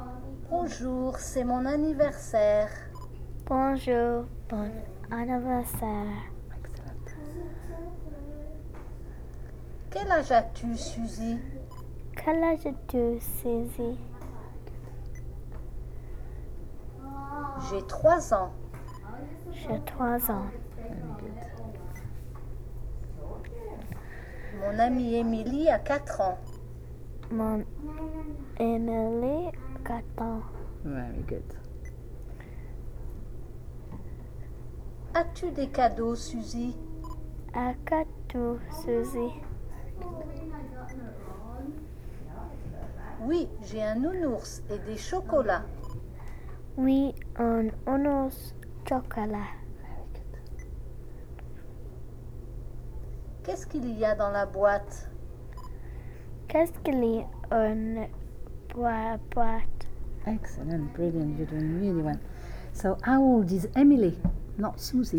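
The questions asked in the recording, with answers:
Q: So, how old is Emily? Not Susie, Emily.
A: 4 years old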